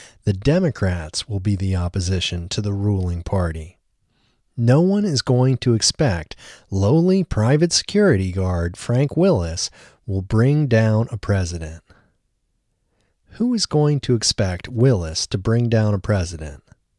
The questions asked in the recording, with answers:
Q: Who is going to expect Willis to bring down a president?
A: No one is going to expect Willis to bring down a president.